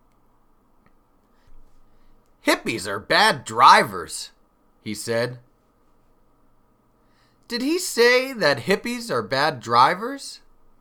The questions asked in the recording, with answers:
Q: Did he say that hippies are bad drivers?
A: Yes, he did. That's what the race car driver said.